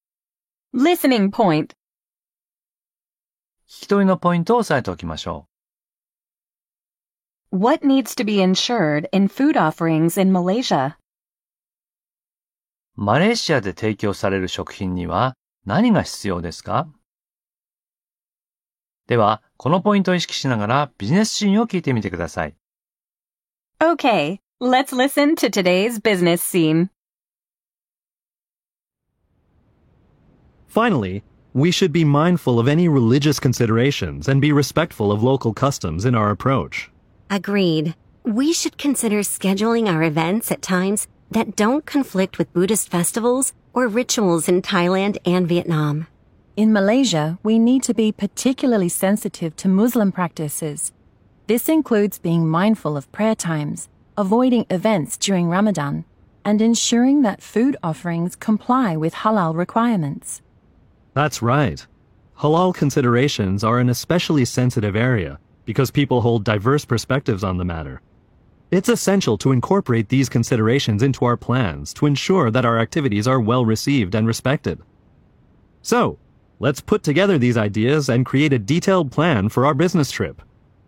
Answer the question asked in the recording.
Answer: They need to comply with halal requirements.